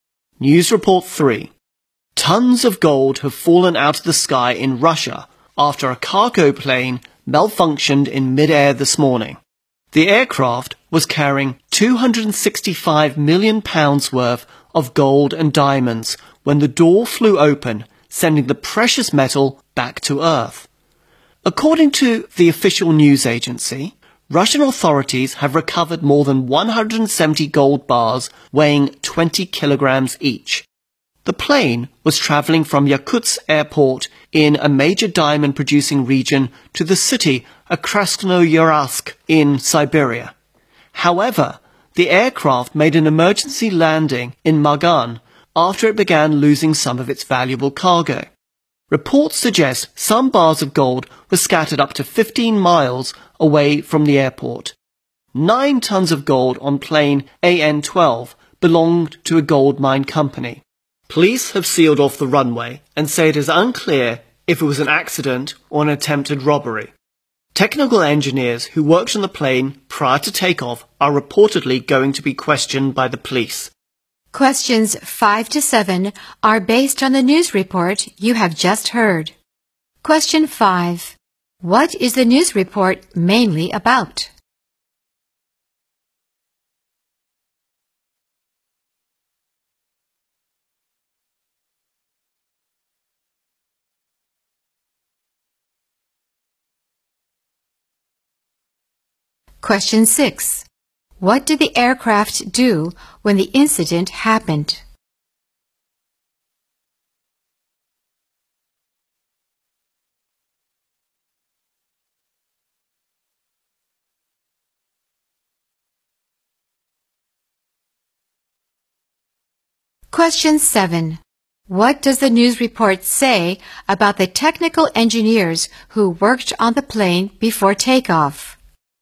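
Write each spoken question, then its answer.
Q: What is the news report mainly about?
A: Gold falling out of a cargo plane in Russia

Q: What did the aircraft do when the incident happened?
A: It made an emergency landing

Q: What does the news report say about the technical engineers who worked on the plane before takeoff?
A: They will be questioned by the police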